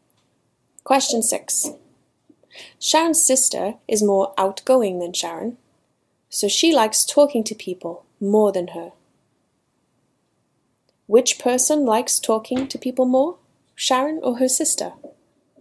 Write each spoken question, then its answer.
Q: Which person likes talking to people more, Sharon or her sister?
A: Sharon's sister is more outgoing than Sharon, so she likes talking to people more than her.